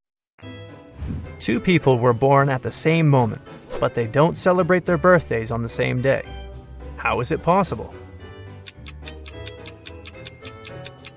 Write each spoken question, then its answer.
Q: How is it possible?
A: They were born in different time zones.